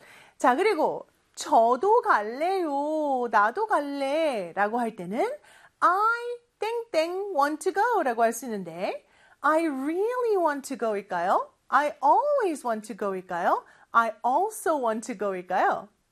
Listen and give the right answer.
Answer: 정답은 맞아요. 3번이죠. I also want to go.